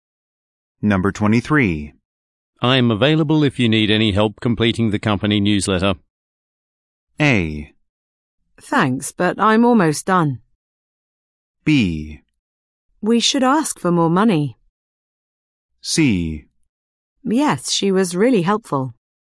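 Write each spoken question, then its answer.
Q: I'm available if you need any help completing the company newsletter.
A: A: Thanks, but I'm almost done.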